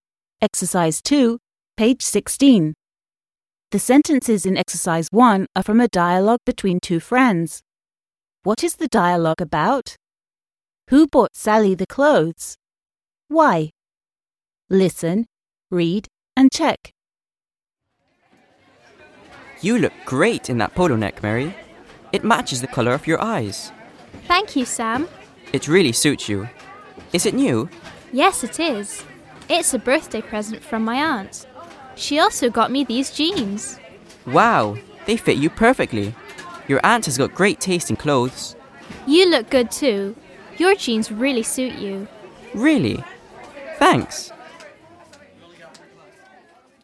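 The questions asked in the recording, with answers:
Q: What is the dialogue about?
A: Clothes Mary got as birthday presents, and how well they suit her

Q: Who bought Sally the clothes?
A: Her aunt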